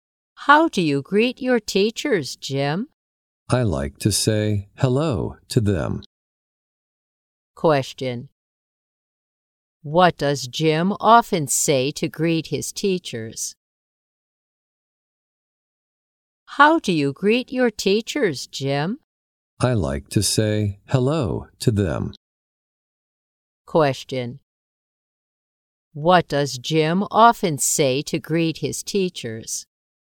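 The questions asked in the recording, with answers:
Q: What does Jim often say to greet his teachers?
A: Hello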